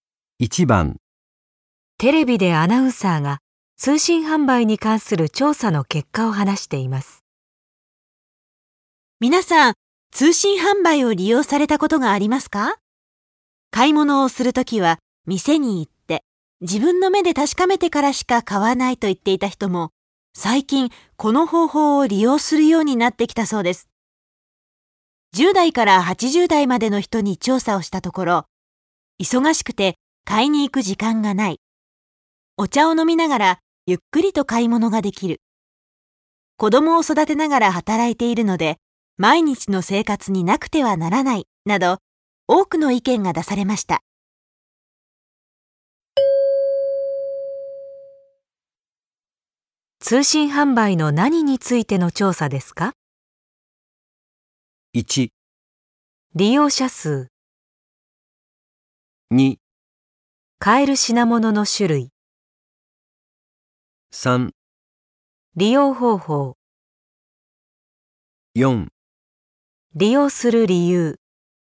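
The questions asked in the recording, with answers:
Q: 通信販売の何についての調査ですか?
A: 4: 利用する理由。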